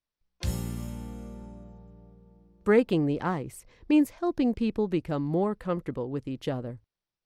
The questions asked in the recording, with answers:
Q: Breaking the ice means helping people become more comfortable with each other.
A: True. Small talk and light refreshments are good ways to break the ice at the beginning of a meeting.